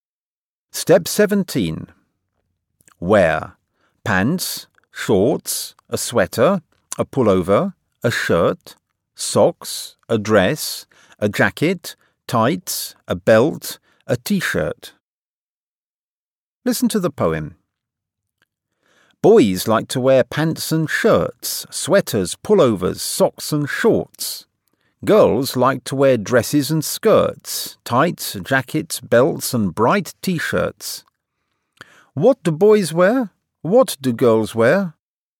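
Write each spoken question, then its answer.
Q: What do boys wear?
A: Pants, shirts, sweaters, pullovers, socks and shorts

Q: What do girls wear?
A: Dresses, skirts, tights, jackets, belts and bright t-shirts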